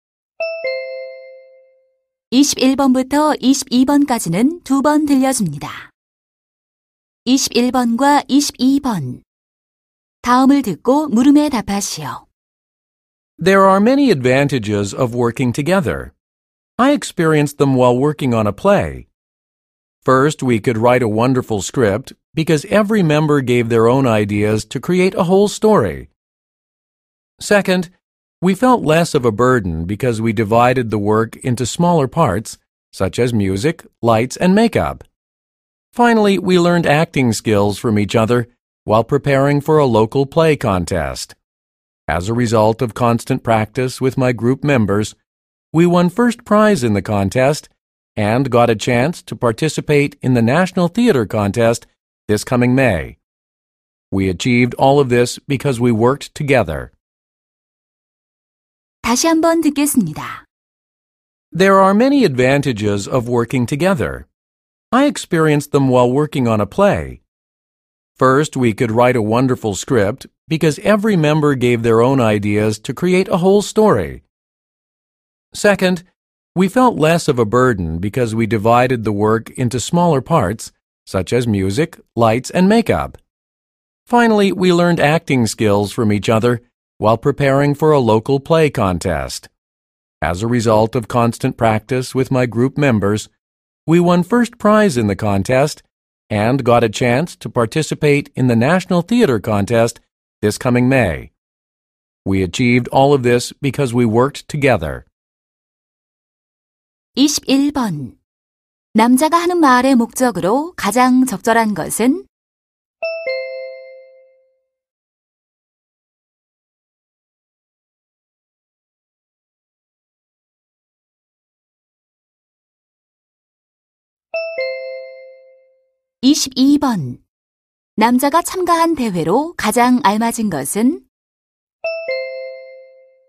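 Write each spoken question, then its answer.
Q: 남자가 하는 말의 목적으로 가장 적절한 것은?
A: 협동 작업의 장점을 알리려고

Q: 남자가 참가한 대회로 가장 알맞은 것은?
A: 지역 연극 대회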